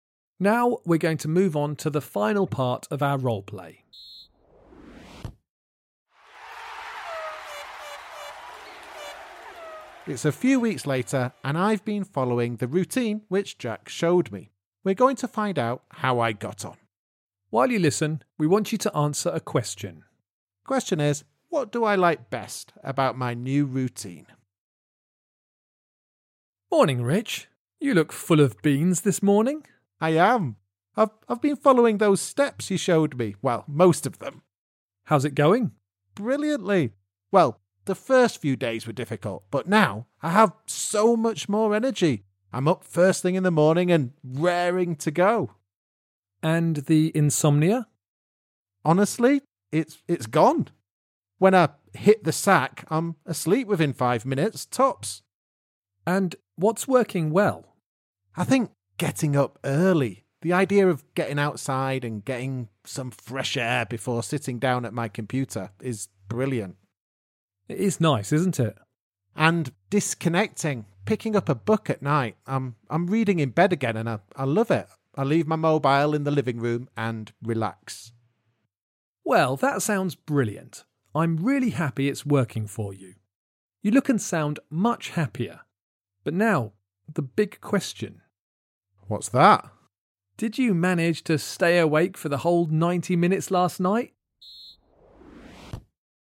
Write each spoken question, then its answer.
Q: what do I like best about my new routine?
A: he mentions getting up early and getting outside to do some exercise as his favourite thing.